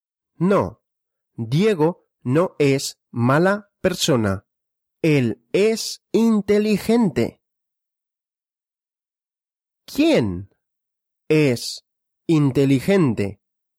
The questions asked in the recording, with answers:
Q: ¿Quién es inteligente?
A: Diego. Diego es inteligente.